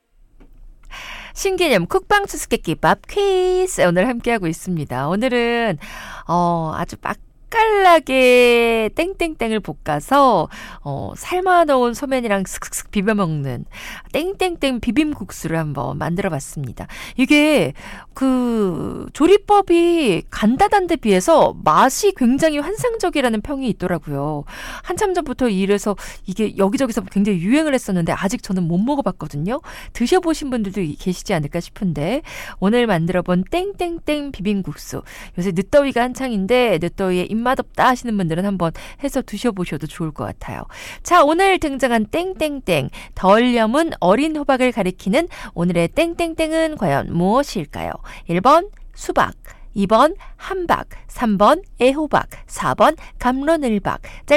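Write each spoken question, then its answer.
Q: 자, 오늘 등장한 땡땡땡 덜 염은 어린 호박을 가리키는 오늘의 땡땡땡은 과연 무엇일까요?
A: 3: 애호박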